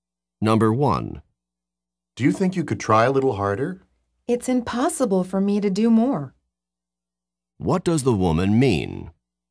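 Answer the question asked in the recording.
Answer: She cannot try any harder.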